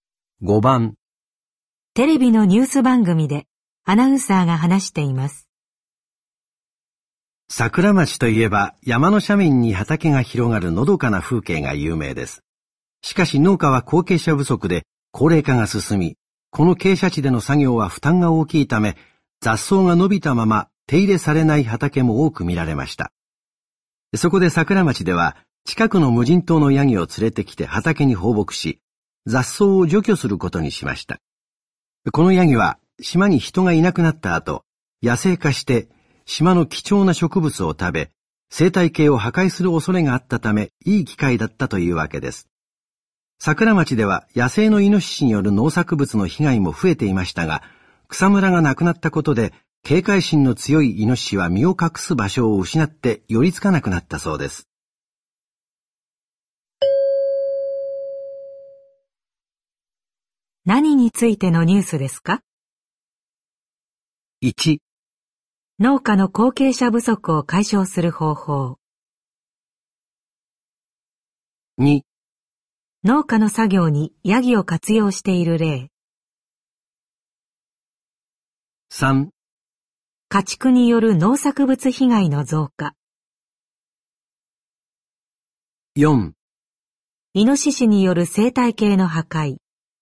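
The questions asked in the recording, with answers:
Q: 何についてのニュースですか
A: 2: 農家の作業にヤギを活用している例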